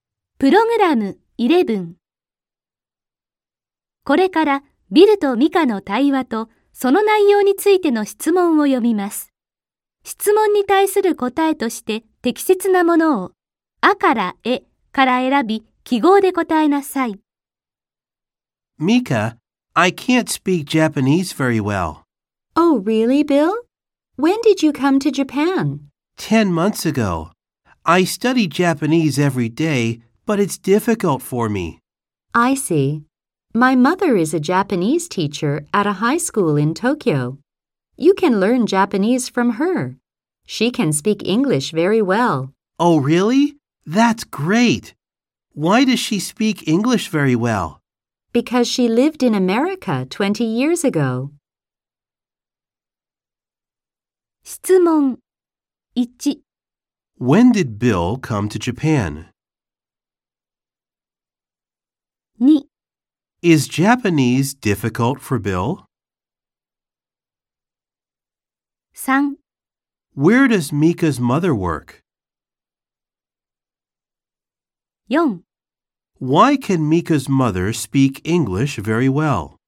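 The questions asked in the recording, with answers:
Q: When did Bill come to Japan?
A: 10 months ago

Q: Is Japanese difficult for Bill?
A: Yes, it is.

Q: Where does Mika's mother work?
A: At a high school in Tokyo

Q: Why can Mika's mother speak English very well?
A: Because she lived in America 20 years ago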